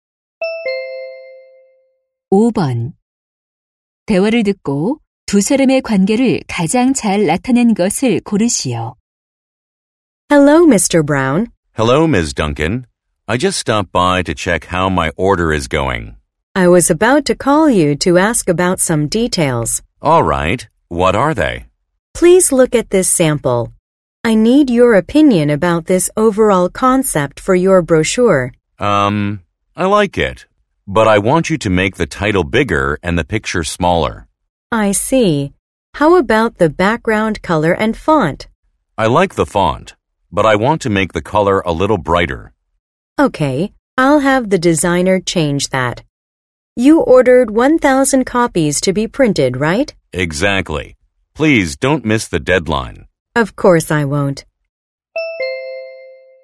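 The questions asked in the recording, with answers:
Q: 대화를 듣고 두 사람의 관계를 가장 잘 나타낸 것을 고르시오.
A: 고객 - 인쇄소(브로셔 제작) 직원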